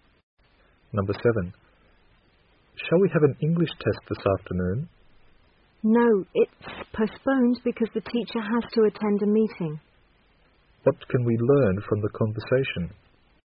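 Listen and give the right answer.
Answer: The English test is postponed because the teacher has a meeting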